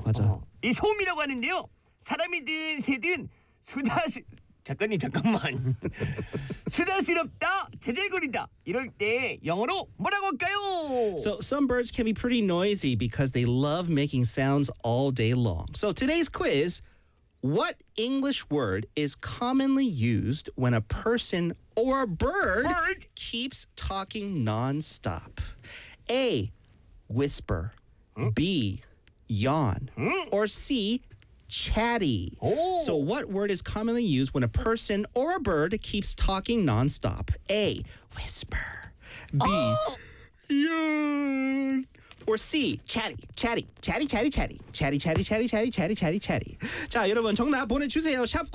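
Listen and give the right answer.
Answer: C: Chatty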